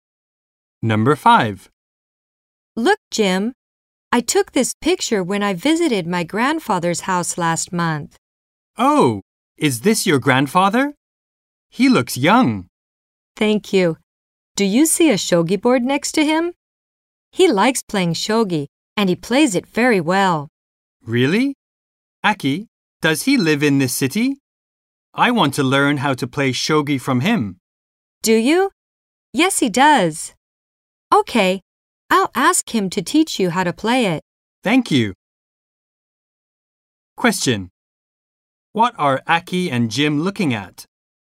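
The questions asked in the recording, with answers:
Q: What are Aki and Jim looking at?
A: A picture of Aki's grandfather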